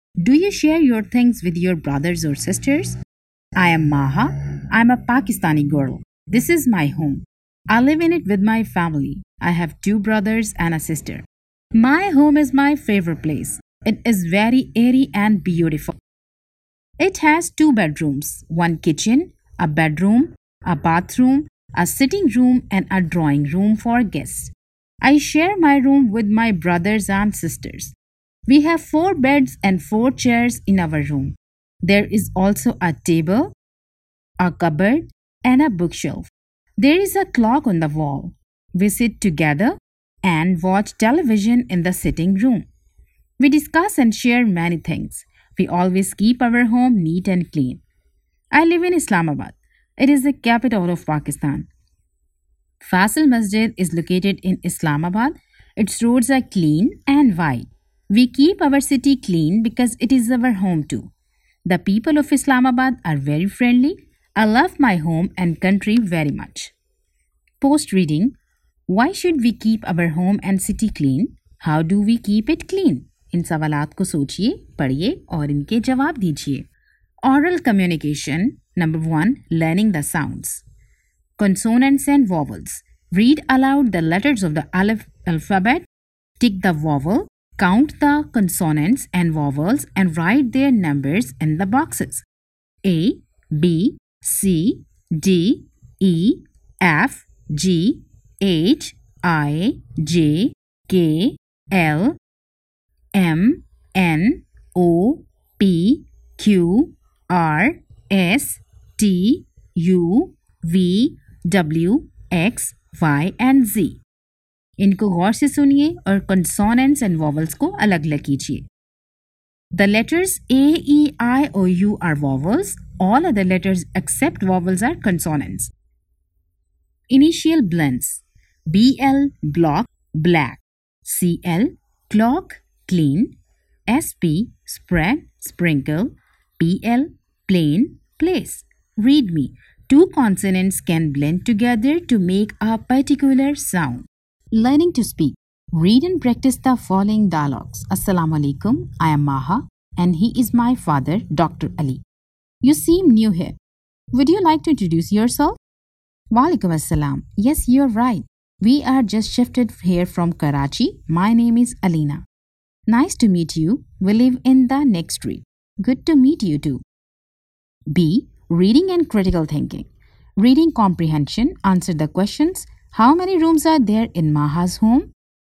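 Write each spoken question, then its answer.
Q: Why should we keep our home and city clean?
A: Because it is our home too.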